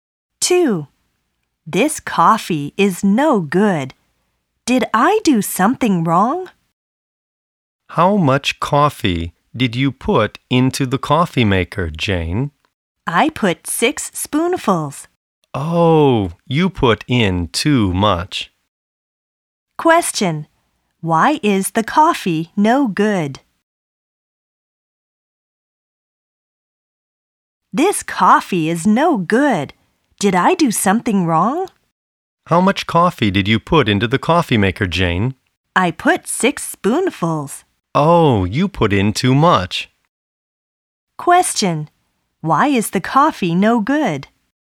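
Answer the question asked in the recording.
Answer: Jane put in too much coffee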